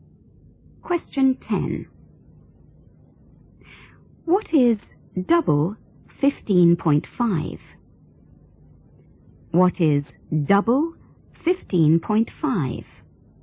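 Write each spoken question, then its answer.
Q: What is double 15.5?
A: 31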